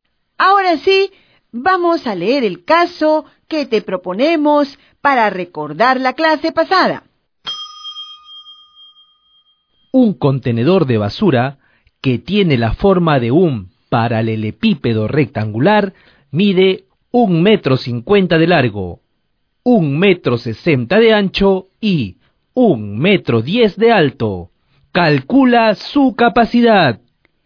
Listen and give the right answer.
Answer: 2 metros cúbicos, 640 decímetros cúbicos.